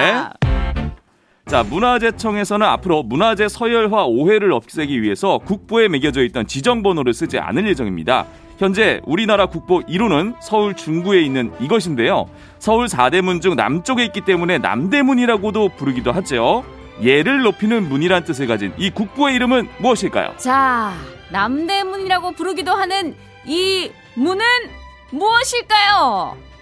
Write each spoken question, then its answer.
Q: 예를 높이는 문이란 뜻을 가진 이 국보의 이름은 무엇일까요?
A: 네, 숭례문입니다.